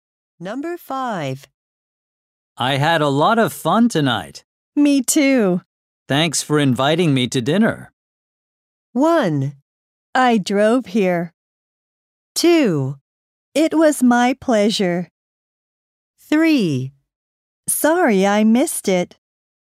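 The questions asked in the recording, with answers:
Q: Thanks for inviting me to dinner.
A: 2: It was my pleasure.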